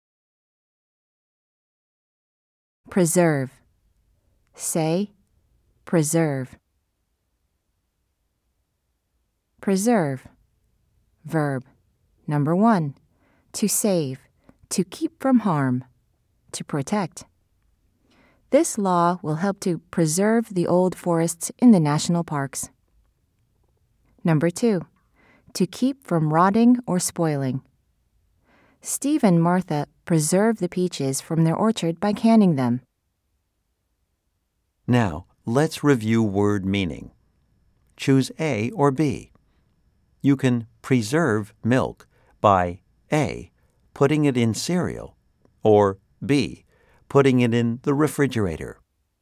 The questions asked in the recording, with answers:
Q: Choose A or B. You can preserve milk by A, putting it in cereal, or B, putting it in the refrigerator.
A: If you said B, you are correct.